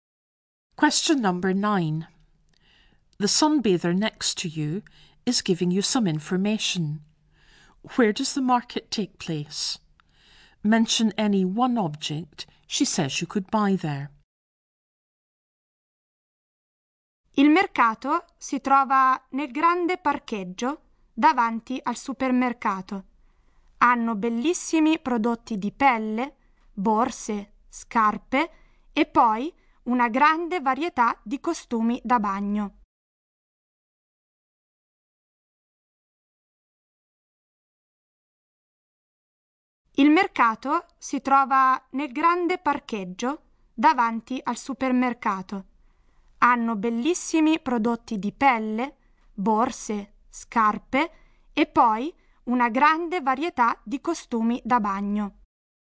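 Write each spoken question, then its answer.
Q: Where does the market take place?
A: In the big car park in front of the supermarket

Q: Mention any one object she says you could buy there.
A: Leather goods, bags, shoes or swimming costumes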